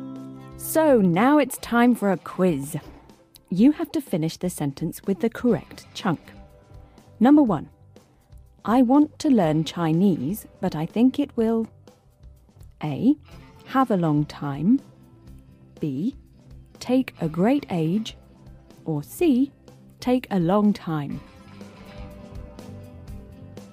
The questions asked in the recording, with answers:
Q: I want to learn Chinese, but I think it will A. Have a long time. B. Take a great age. Or C. Take a long time.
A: The natural way to say it is C. Take a long time.